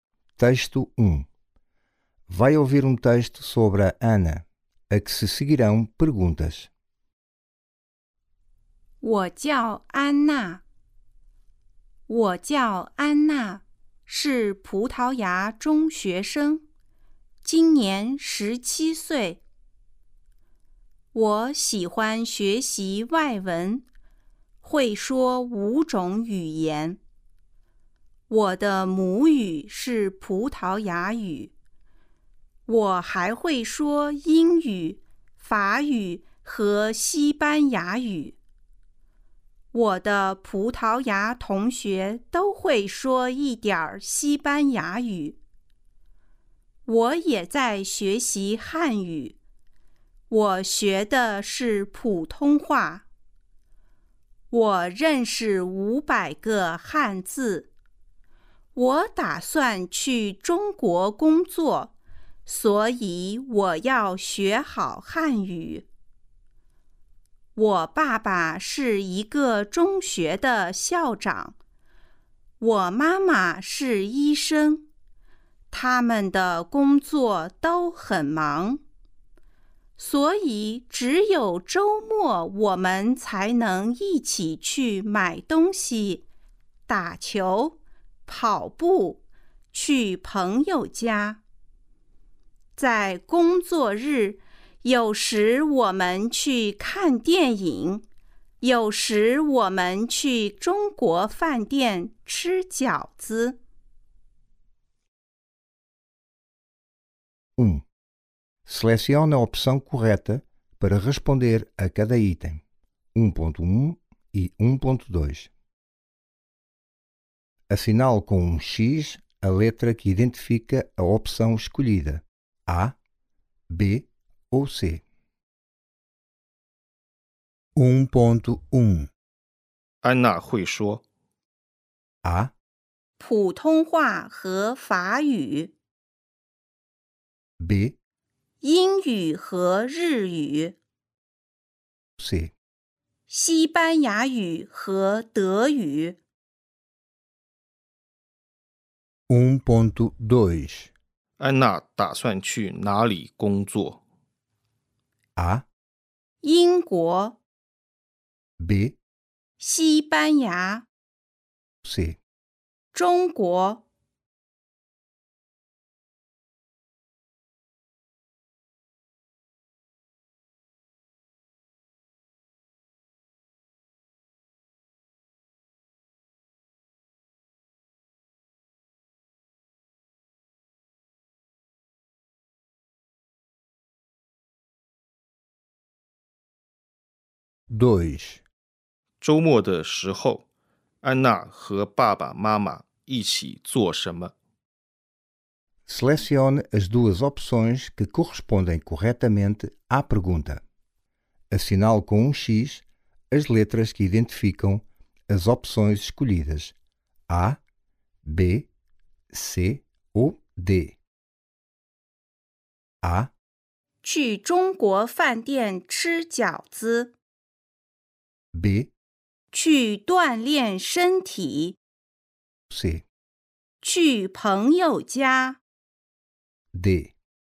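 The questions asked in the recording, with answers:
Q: 安娜会说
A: A: 普通话和法语

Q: 安娜打算去哪里工作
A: C: 中国

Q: 周末的时候,安娜和爸爸妈妈一起做什么?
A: B: 去锻炼身体。; C: 去朋友家。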